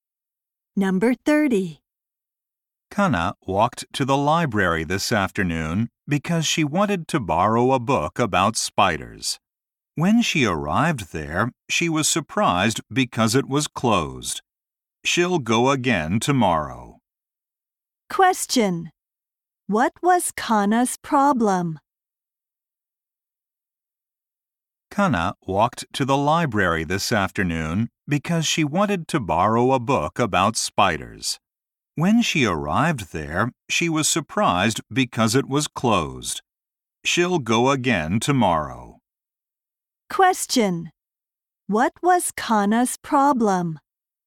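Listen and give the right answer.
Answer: The library was closed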